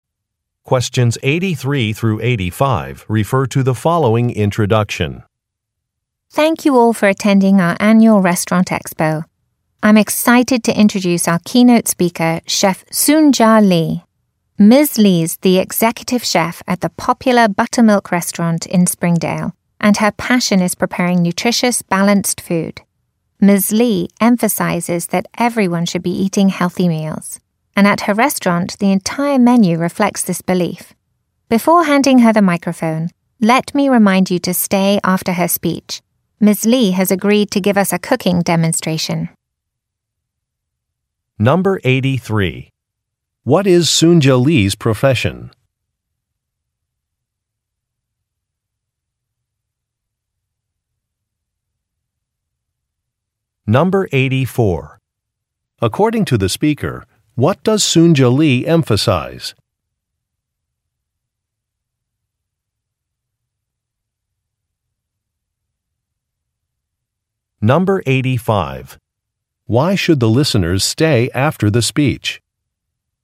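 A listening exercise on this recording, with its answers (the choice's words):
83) What is Soonja Lee's profession?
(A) Doctor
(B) Chef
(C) Farmer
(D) Teacher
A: Chef

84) According to the speaker, what does Soonja Lee emphasize?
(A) Eating healthy foods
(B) Practicing cooking skills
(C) Shopping locally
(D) Taking courses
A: Eating healthy foods

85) Why should the listeners stay after the speech?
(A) To ask questions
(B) To enter a contest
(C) To see a demonstration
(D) To buy a book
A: To see a demonstration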